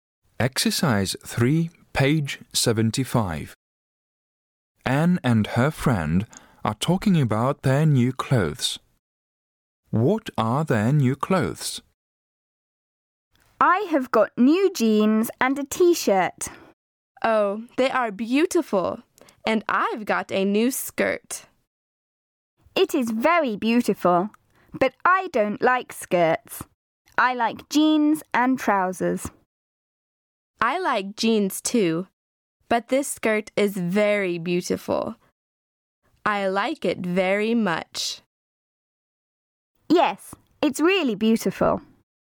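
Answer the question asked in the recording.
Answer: New jeans and a t-shirt, and a new skirt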